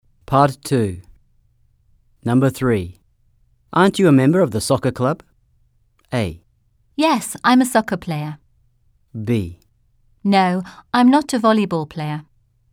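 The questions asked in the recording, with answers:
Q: Aren't you a member of the soccer club?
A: A: Yes, I'm a soccer player.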